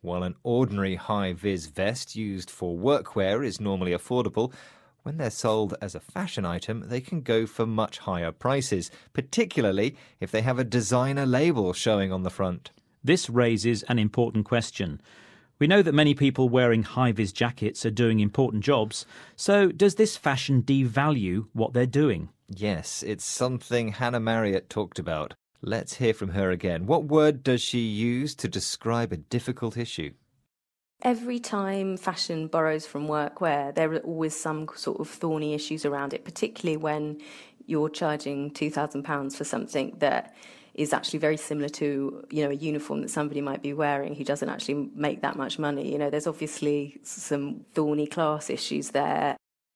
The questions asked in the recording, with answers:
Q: What word does she use to describe a difficult issue?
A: So she used the word thorny to describe the issue of things worn at work becoming expensive fashion items.